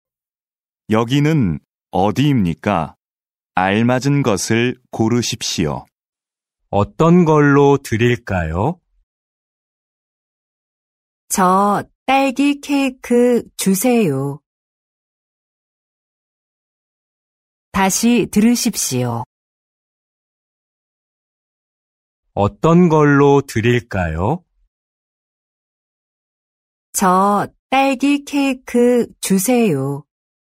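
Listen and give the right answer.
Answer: 빵집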